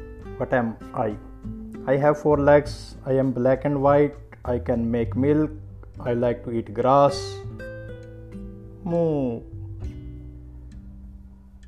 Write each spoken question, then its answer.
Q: What am I?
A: I am a cow.